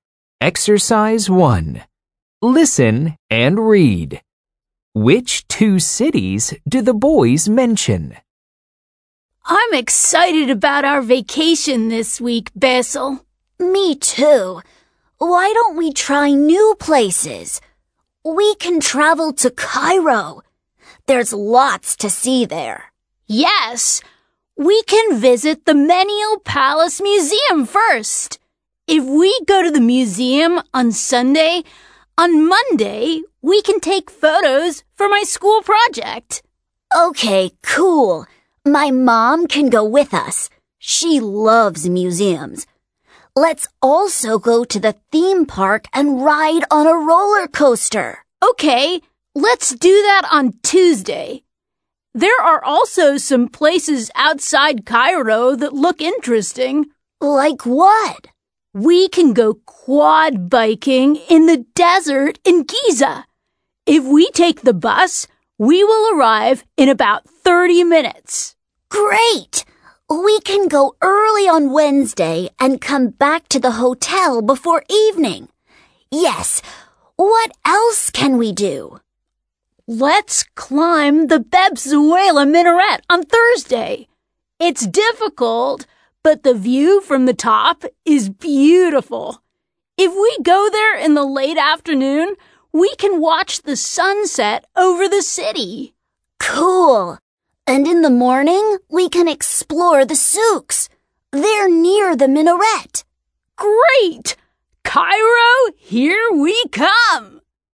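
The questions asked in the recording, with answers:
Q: Which two cities do the boys mention?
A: Cairo and Giza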